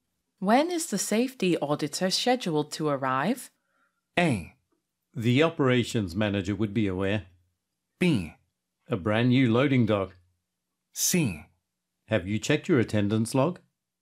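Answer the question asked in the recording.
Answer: A: The operations manager would be aware.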